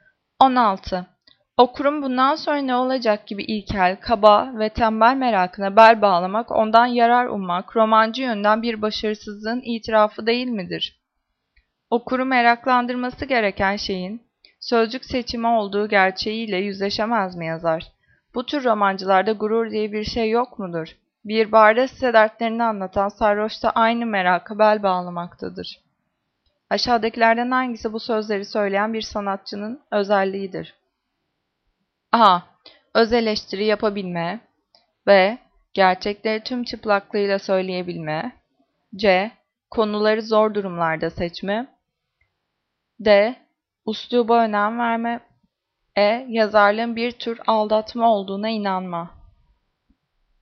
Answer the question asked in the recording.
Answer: Cevap D. Üsluba önem verme.